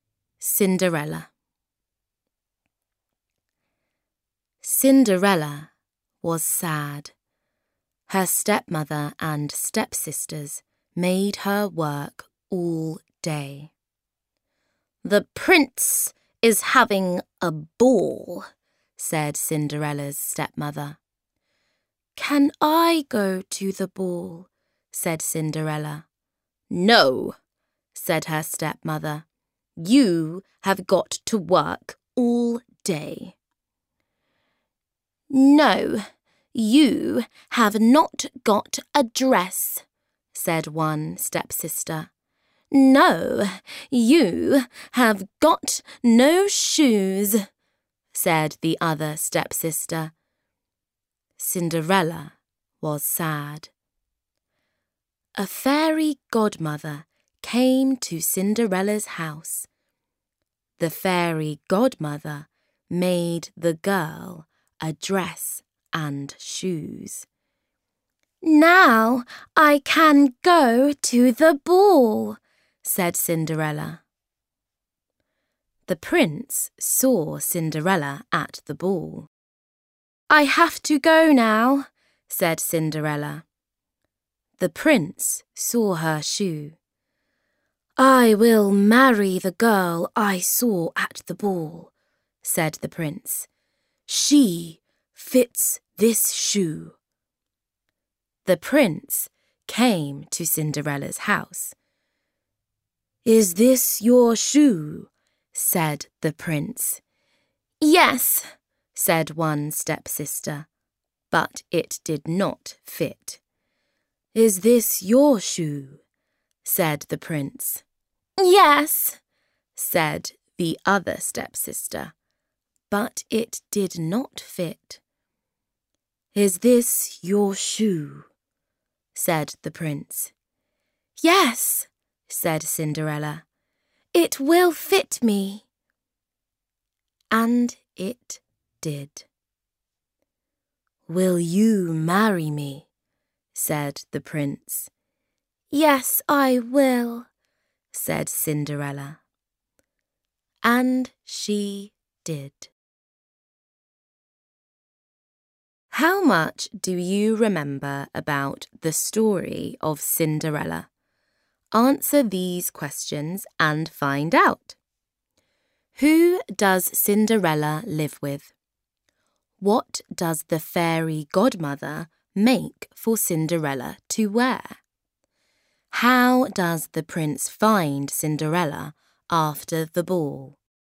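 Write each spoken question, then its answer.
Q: Who does Cinderella live with?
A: Her stepmother and stepsisters

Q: What does the fairy godmother make for Cinderella to wear?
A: A dress and shoes

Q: How does the prince find Cinderella after the ball?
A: He finds the girl whose foot fits the shoe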